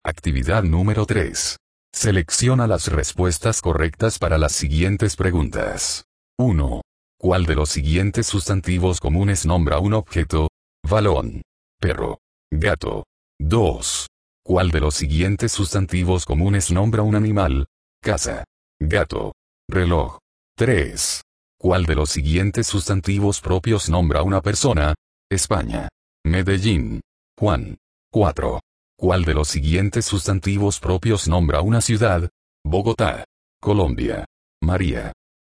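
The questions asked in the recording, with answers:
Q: ¿Cuál de los siguientes sustantivos comunes nombra un objeto?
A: Balón

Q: ¿Cuál de los siguientes sustantivos comunes nombra un animal?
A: Gato

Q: ¿Cuál de los siguientes sustantivos propios nombra una persona?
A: Juan

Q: ¿Cuál de los siguientes sustantivos propios nombra una ciudad?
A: Bogotá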